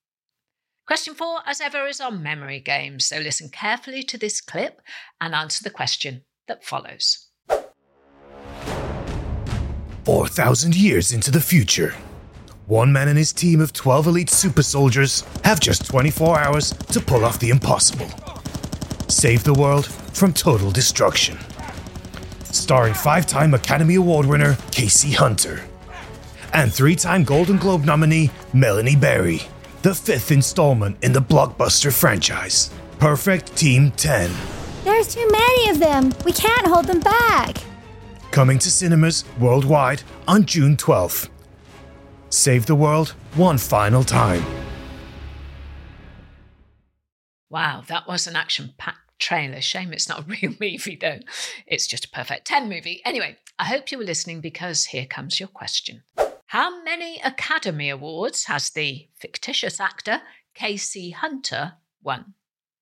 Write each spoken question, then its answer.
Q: How many Academy Awards has the fictitious actor Casey Hunter won?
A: The answer was five. Five Academy Awards for the fictional movie star Casey Hunter.